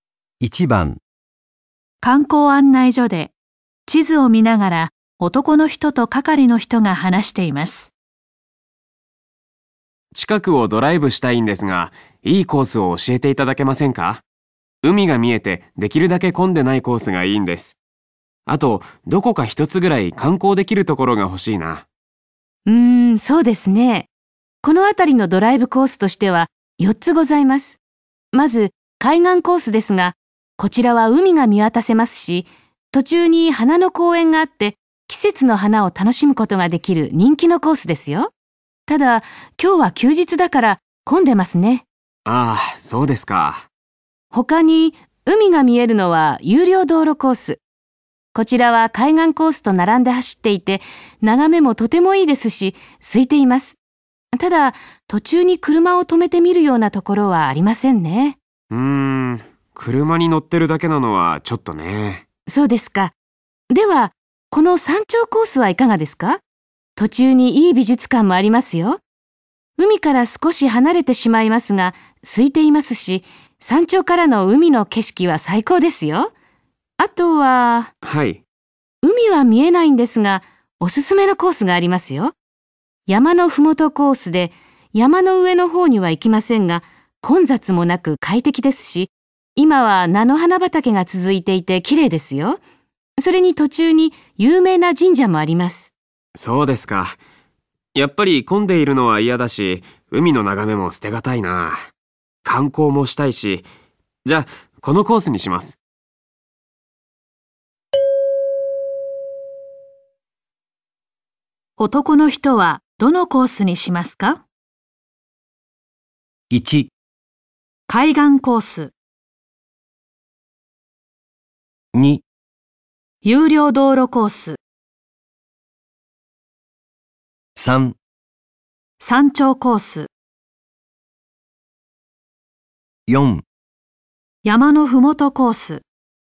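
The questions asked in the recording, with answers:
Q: 男の人はどのコースにしますか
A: 3: 山頂コース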